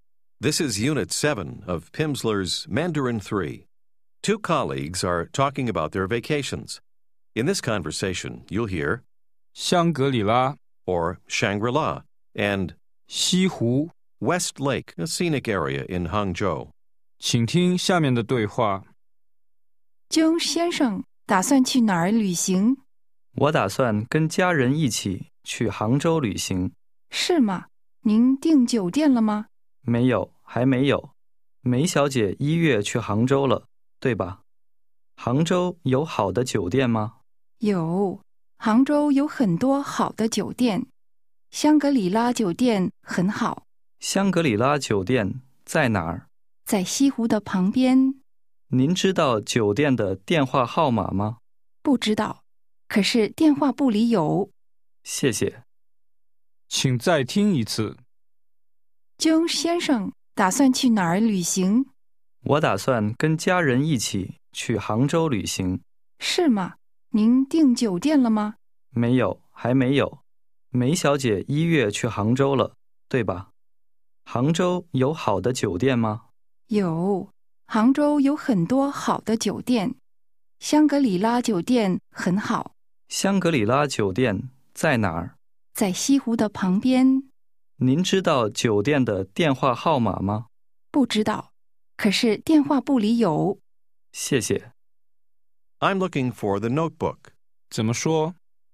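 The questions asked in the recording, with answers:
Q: 江先生打算去哪儿旅行?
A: 杭州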